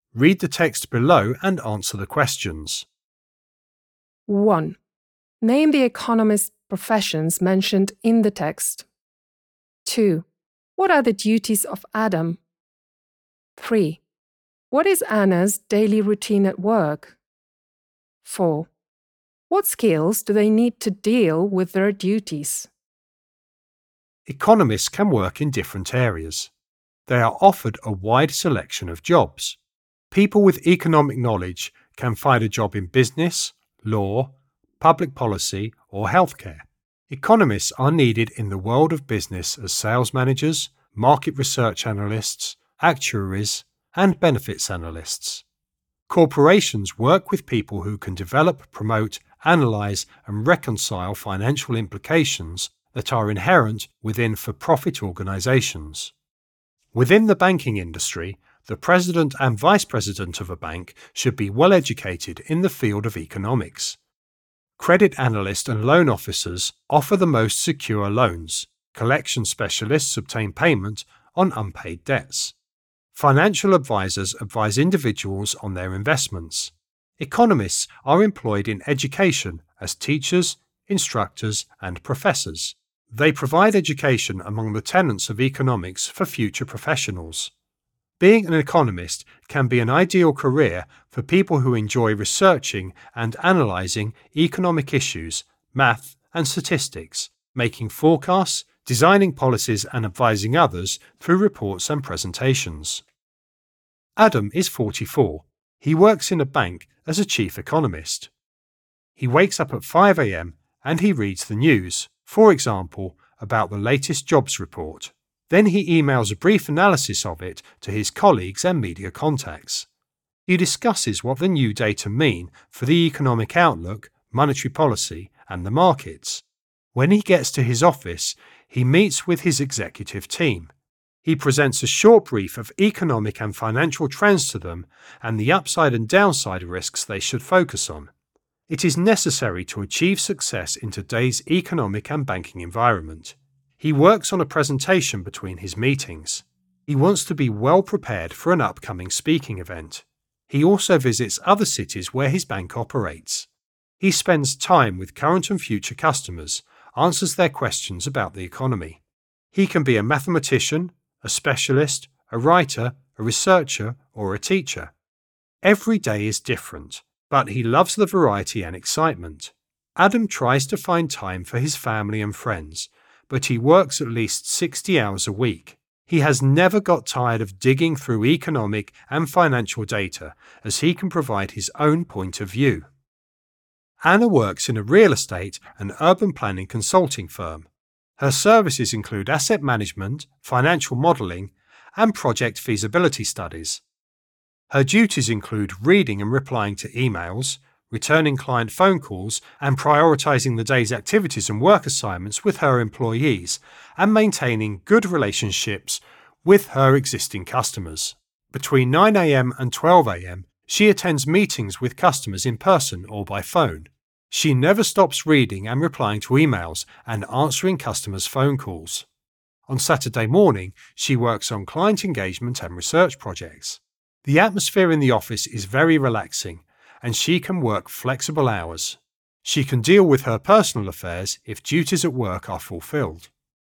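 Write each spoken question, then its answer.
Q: Name the economist professions mentioned in the text.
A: Sales managers, market research analysts, actuaries, benefits analysts, bank presidents and vice presidents, credit analysts, loan officers, collection specialists, financial advisors, teachers, instructors and professors

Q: What are the duties of Adam?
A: As a bank's chief economist he reads the news and emails analyses to colleagues and media, briefs the executive team on economic and financial trends and risks, prepares presentations for speaking events, and visits customers in other cities to answer their questions about the economy

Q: What is Anna's daily routine at work?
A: She reads and replies to emails, returns client calls, sets the day's priorities and work assignments with her employees, and meets customers in person or by phone from 9 to 12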